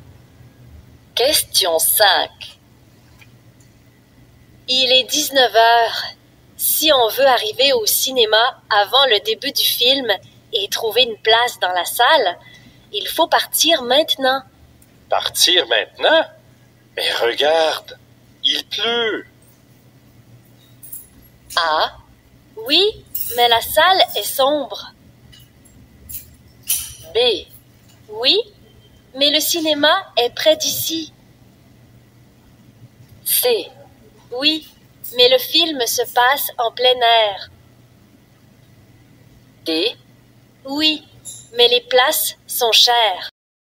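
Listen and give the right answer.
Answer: B: Oui, mais le cinéma est près d'ici.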